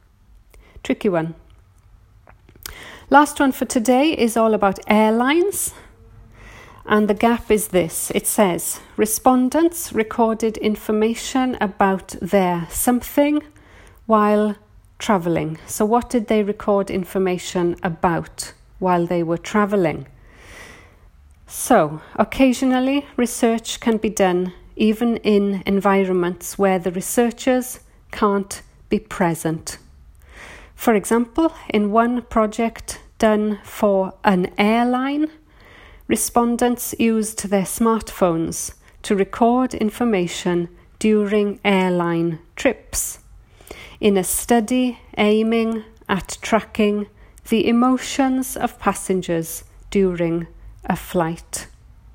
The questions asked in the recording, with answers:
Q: It says, respondents recorded information about their something while traveling.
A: and the one word answer therefore is emotions.